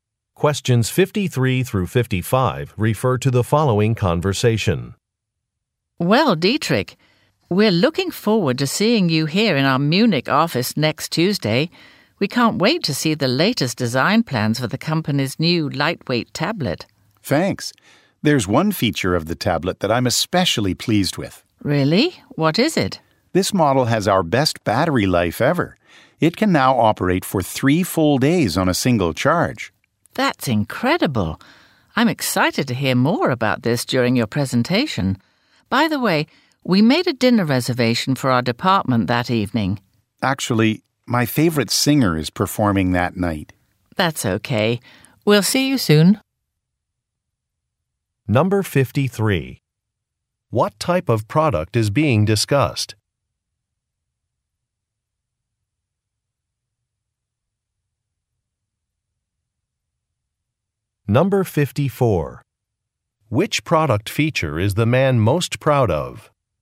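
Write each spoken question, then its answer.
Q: What type of product is being discussed?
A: A tablet

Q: Which product feature is the man most proud of?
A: Battery life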